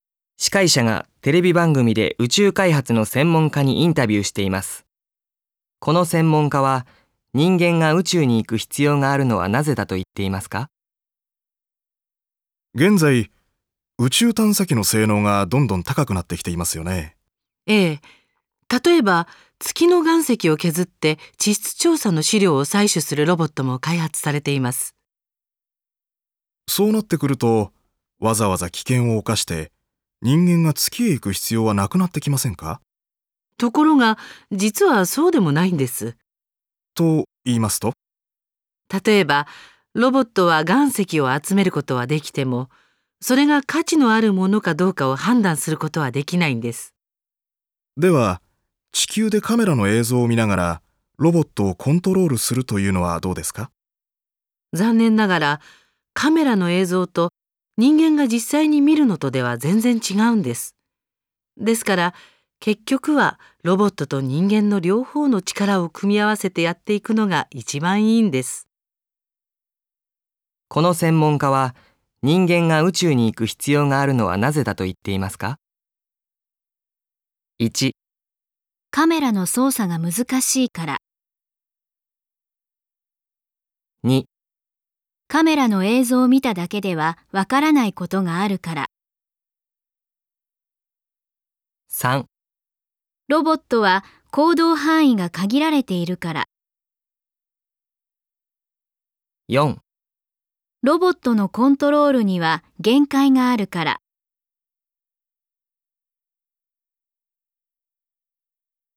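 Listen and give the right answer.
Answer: 2: カメラの映像を見ただけではわからないことがあるから。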